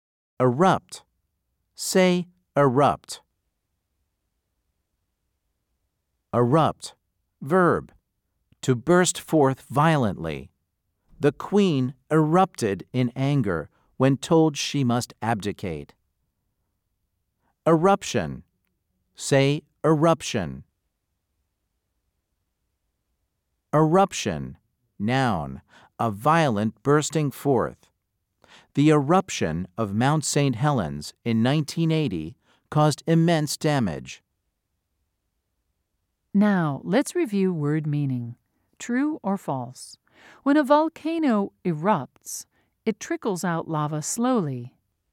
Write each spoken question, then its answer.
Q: True or false? When a volcano erupts, it trickles out lava slowly.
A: If you said false, you are correct.